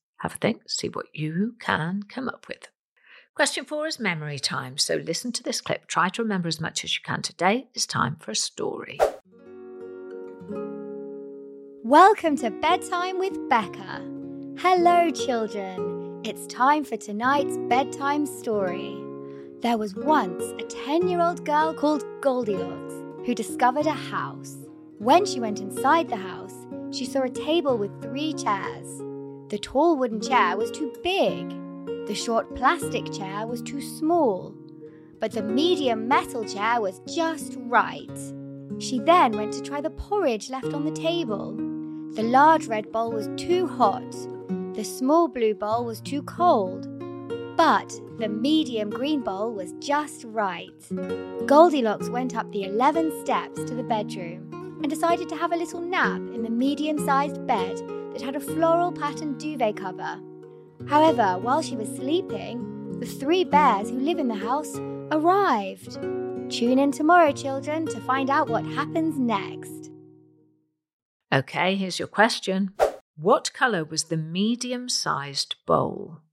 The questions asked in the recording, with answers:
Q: What colour was the medium-sized bowl?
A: the medium-sized bowl was green.